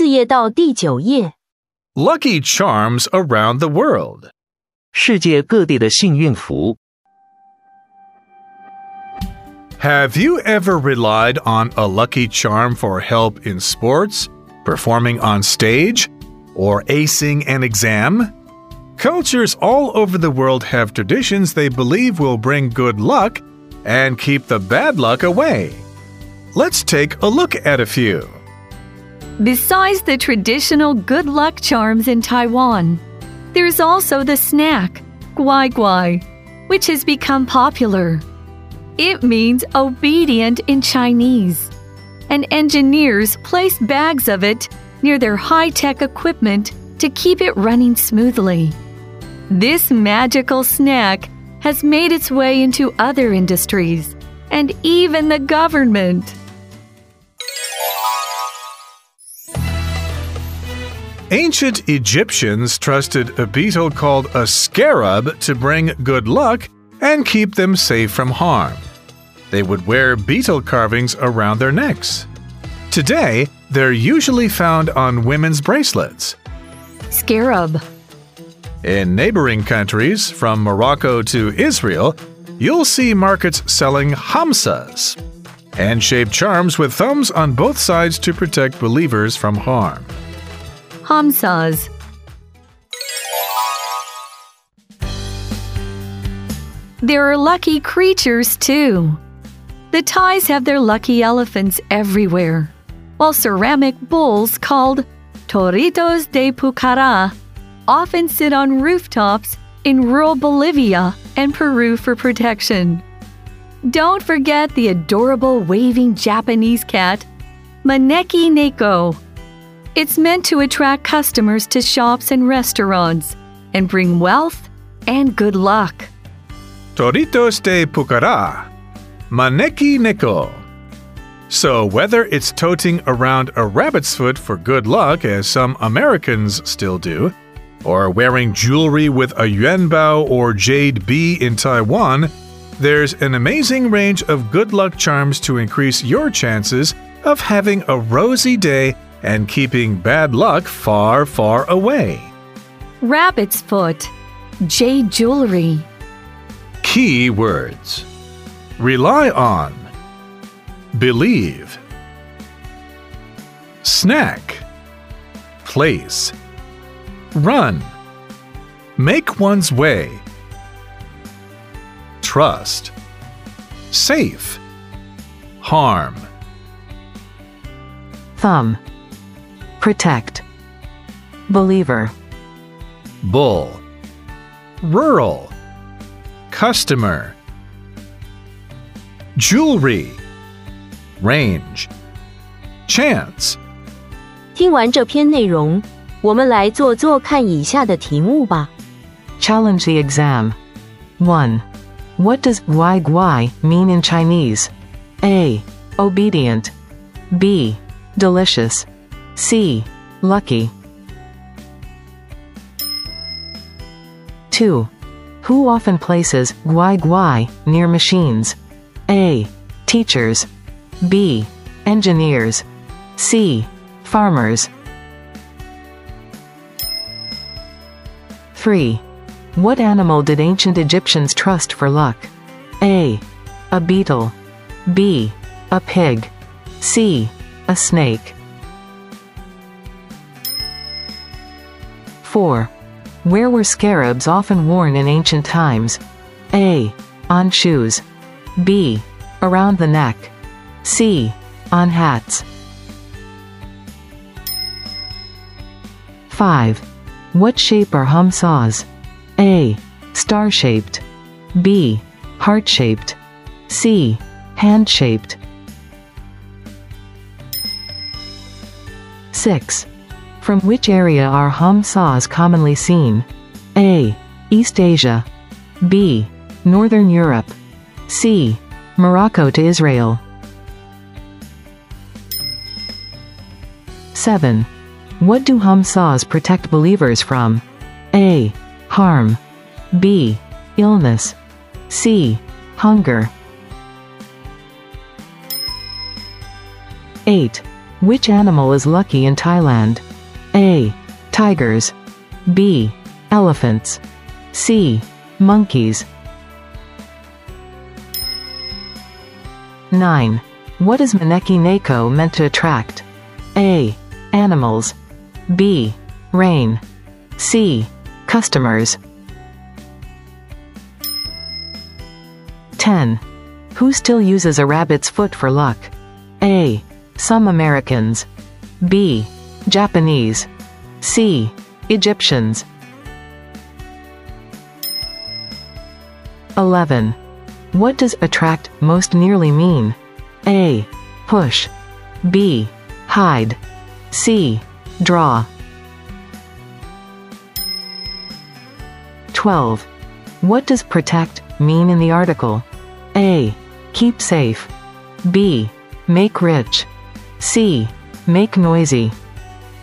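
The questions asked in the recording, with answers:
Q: What does guai guai mean in Chinese?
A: A: Obedient.

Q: Who often places guai guai near machines?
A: B: Engineers.

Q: What animal did ancient Egyptians trust for luck?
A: A: A beetle.

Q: Where were scarabs often worn in ancient times?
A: B: Around the neck.

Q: What shape are hamsas?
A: C: Hand-shaped.

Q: From which area are hamsas commonly seen?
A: C: Morocco to Israel.

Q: What do hamsas protect believers from?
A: A: Harm.

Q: Which animal is lucky in Thailand?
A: B: Elephants.

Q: What is Maneki Neko meant to attract?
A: C: Customers.

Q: Who still uses a rabbit's foot for luck?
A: A: Some Americans.

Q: What does attract most nearly mean?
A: C: Draw.

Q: What does protect mean in the article?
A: A: Keep safe.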